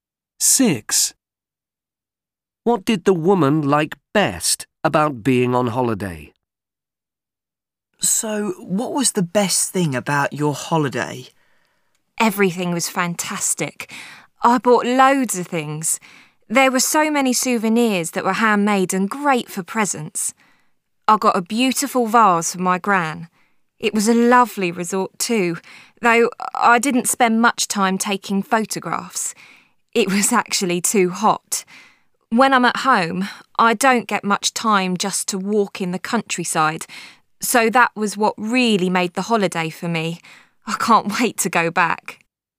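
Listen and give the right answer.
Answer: walking in the countryside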